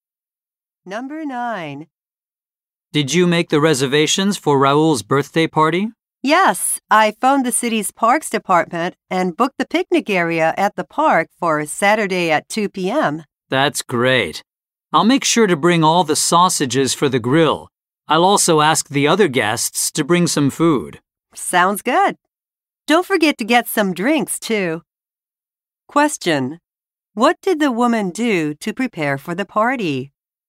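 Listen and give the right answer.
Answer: She booked the park's picnic area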